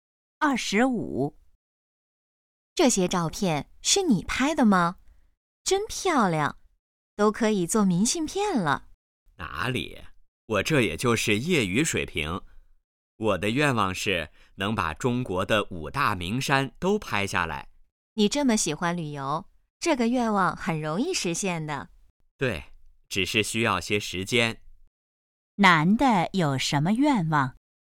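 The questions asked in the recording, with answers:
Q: 男的有什么愿望?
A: 把中国的5大名山都拍下来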